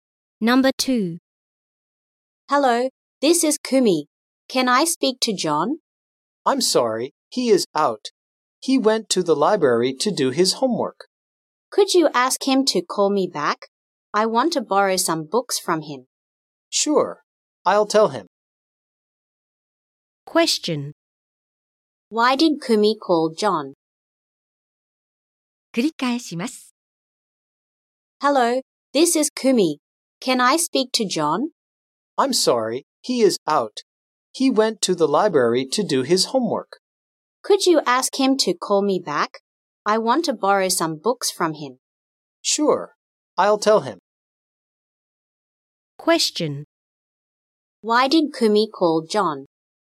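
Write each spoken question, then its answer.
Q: Why did Kumi call John?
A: She wants to borrow some books from him.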